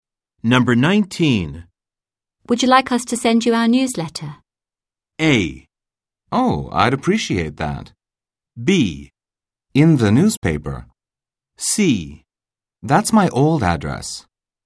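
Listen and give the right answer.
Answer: A: Oh, I'd appreciate that.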